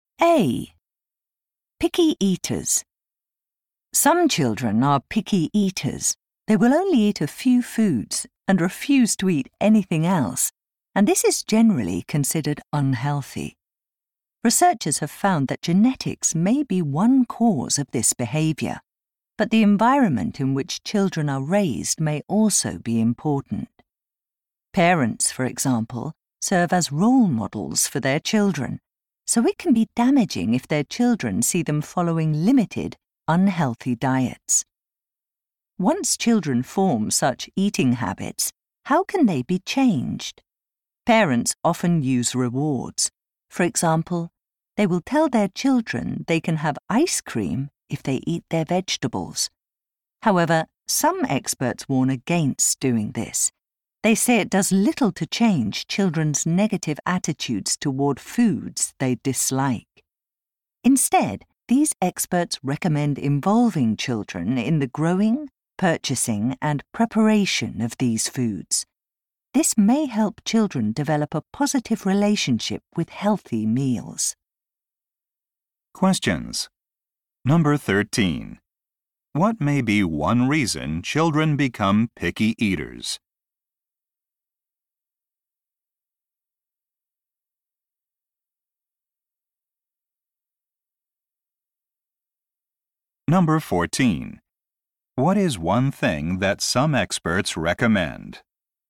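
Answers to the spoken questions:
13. Their parents follow limited, unhealthy diets (genetics or environment).
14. Involving children in growing, buying and preparing the foods.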